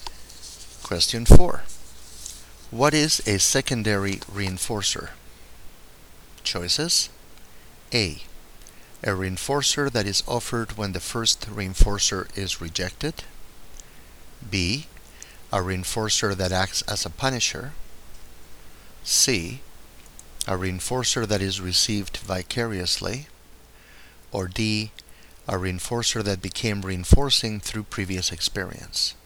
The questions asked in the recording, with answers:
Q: What is a secondary reinforcer?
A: The correct choice here is D.